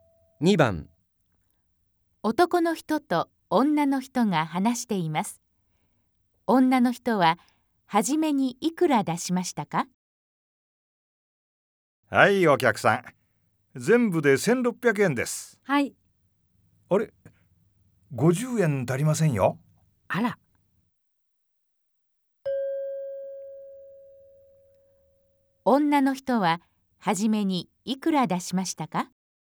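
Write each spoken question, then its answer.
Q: 女の人は初めにいくら出しましたか?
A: 1550円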